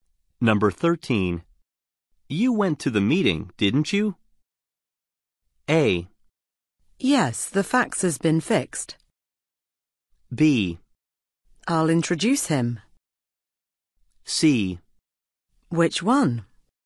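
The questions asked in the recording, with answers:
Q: You went to the meeting, didn't you?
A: C: Which one?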